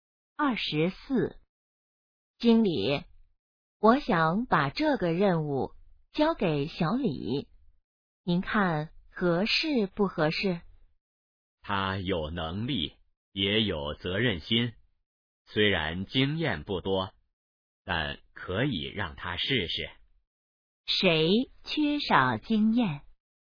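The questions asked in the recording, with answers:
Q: 谁缺少经验?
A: 小李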